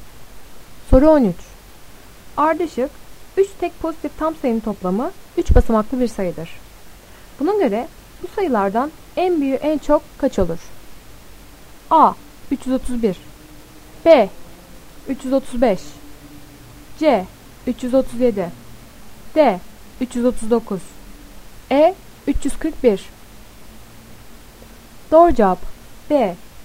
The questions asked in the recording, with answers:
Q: Buna göre bu sayılardan en büyüğü en çok kaç olur?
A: Doğru cevap B.